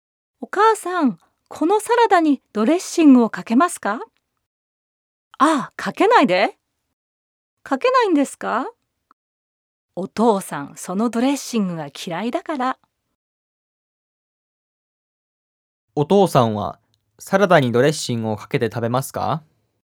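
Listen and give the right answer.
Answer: いいえ、ドレッシングをかけないで食べます。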